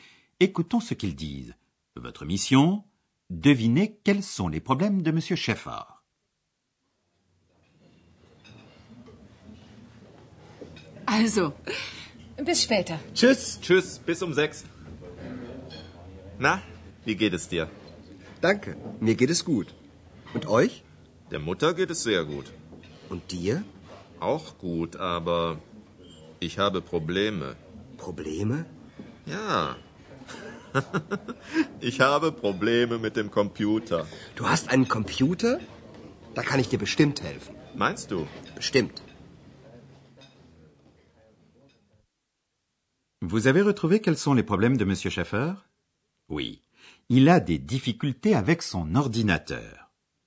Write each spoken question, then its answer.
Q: Vous avez retrouvé quels sont les problèmes de Monsieur Schaeffer?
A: Il a des difficultés avec son ordinateur.